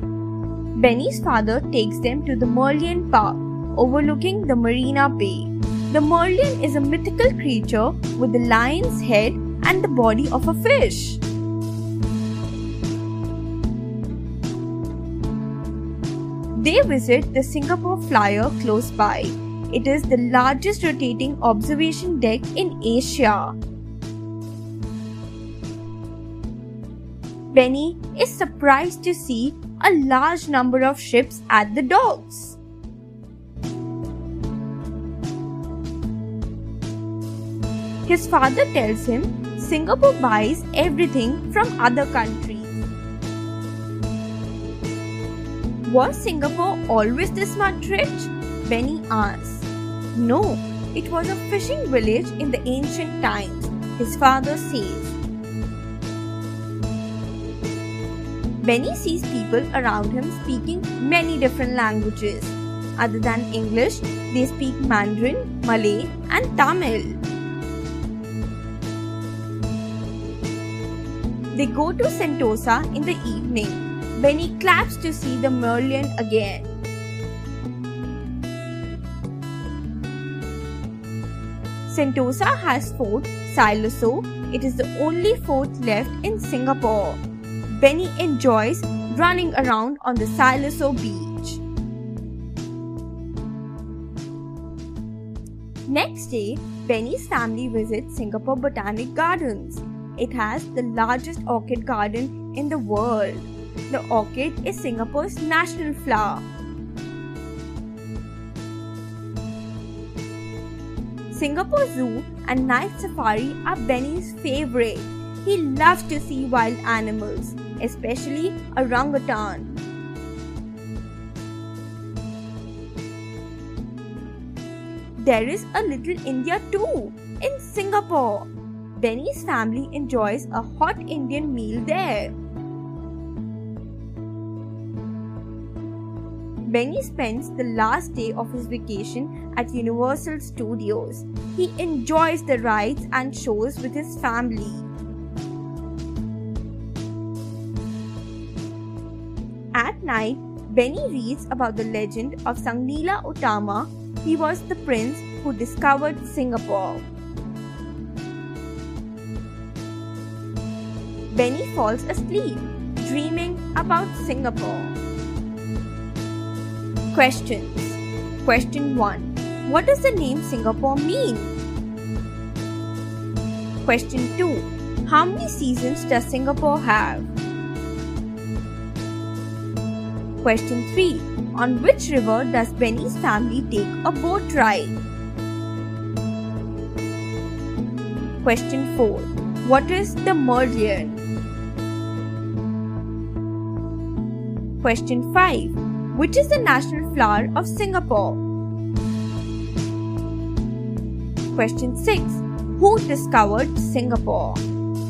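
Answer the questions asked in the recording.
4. A mythical creature with a lion's head and the body of a fish
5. The orchid
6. Sang Nila Utama, a prince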